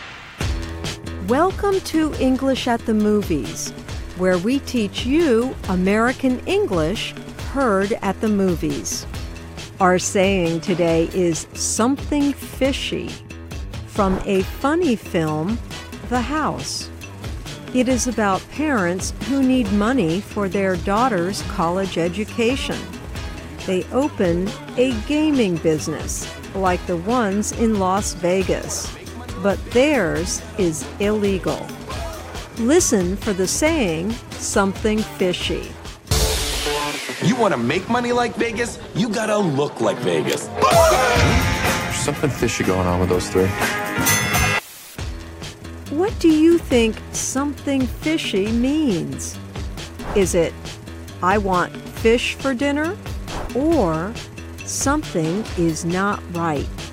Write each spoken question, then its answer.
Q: What do you think something fishy means?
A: Something fishy means something is not right.